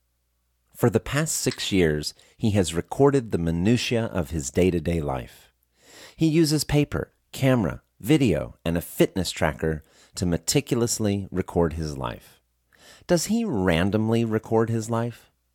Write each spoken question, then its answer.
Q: Does he randomly record his life?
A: No, he doesn't randomly record his life.